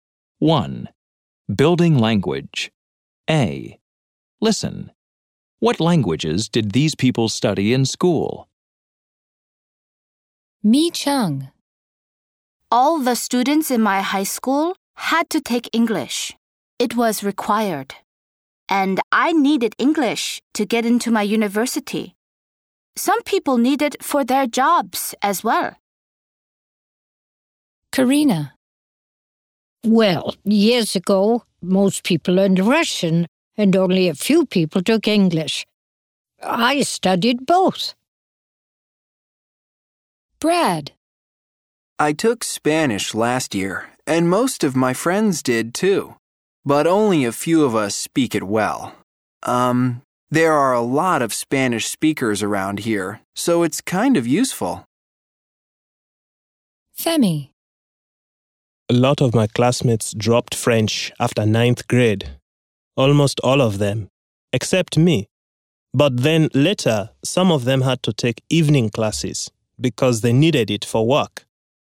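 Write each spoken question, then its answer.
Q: What languages did these people study in school?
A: Mi Cheng: English; Karina: Russian and English; Brad: Spanish; Femi: French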